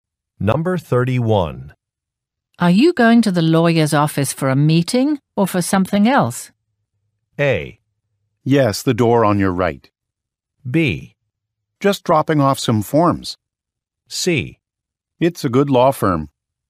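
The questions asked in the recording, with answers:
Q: Are you going to the lawyer's office for a meeting or for something else?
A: B: Just dropping off some forms.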